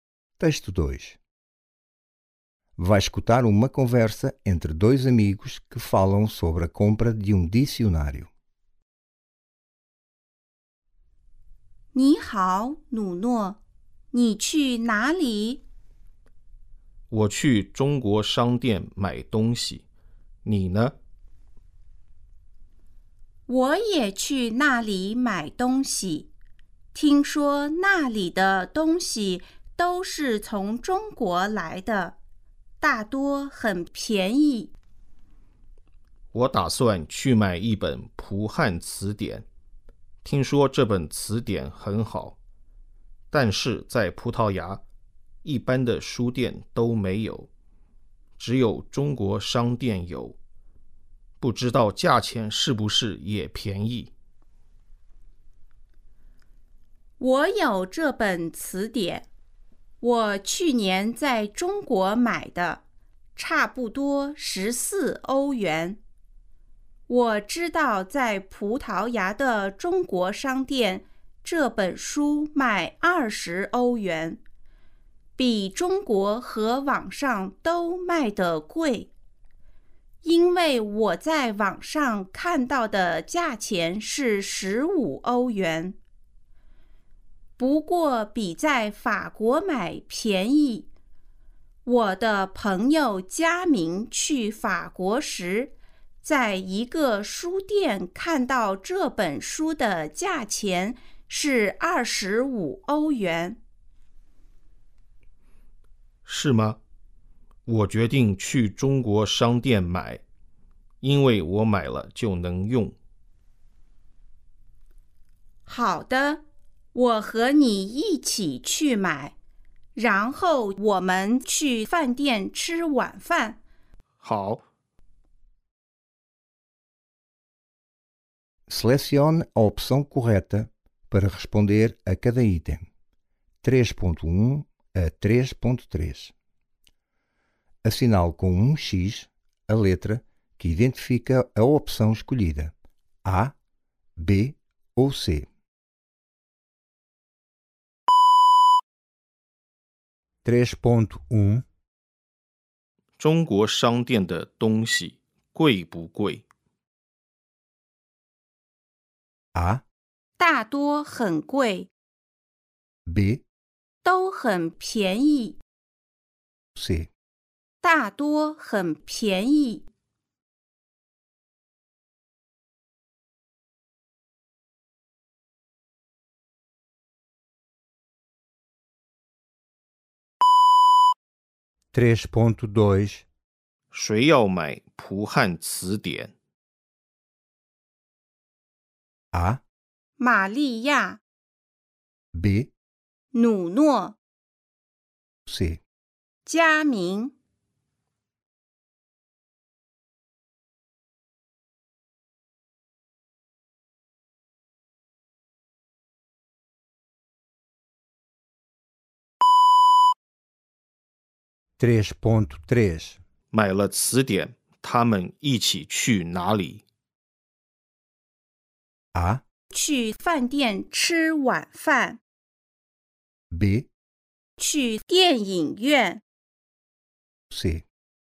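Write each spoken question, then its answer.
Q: ¿China商店的东西贵不贵?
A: C: 大多很便宜

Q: ¿Mai了词典,他们一起去哪里?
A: A: 去饭店吃晚饭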